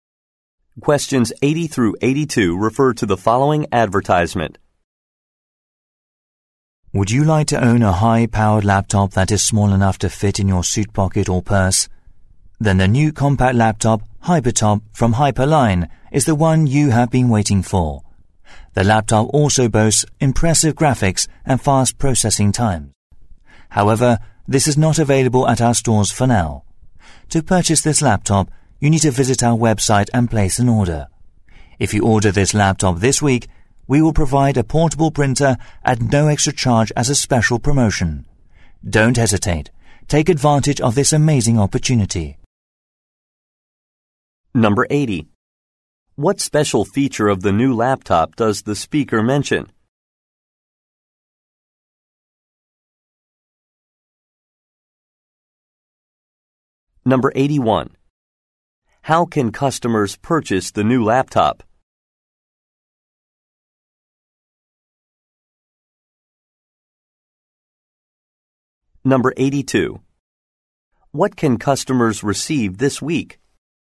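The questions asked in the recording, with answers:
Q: What special feature of the new laptop does the speaker mention?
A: It is small enough to fit in a pocket

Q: How can customers purchase the new laptop?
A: Order on the website

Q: What can customers receive this week?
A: A free portable printer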